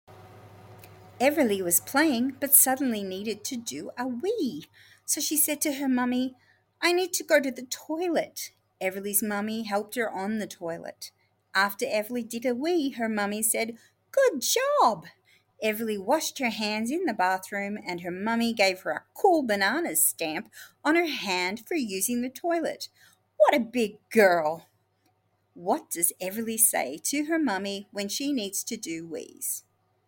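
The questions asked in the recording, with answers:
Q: What does Everly say to her mummy when she needs to do wees?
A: I need to go to the toilet.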